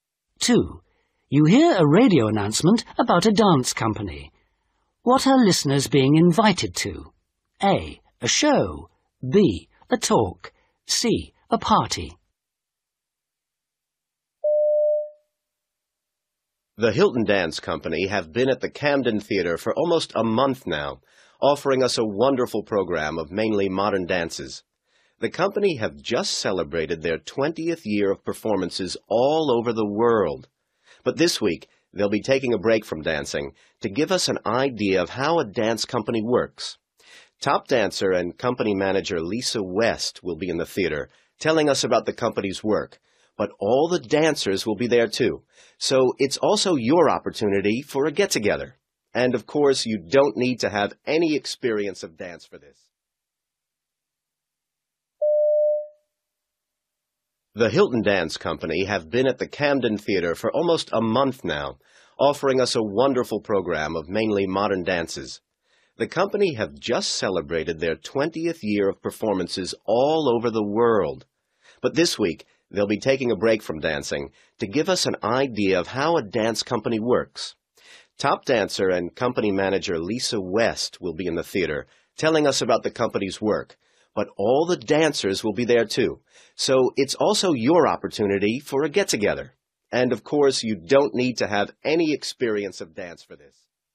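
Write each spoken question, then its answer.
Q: What are listeners being invited to?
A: B: A talk.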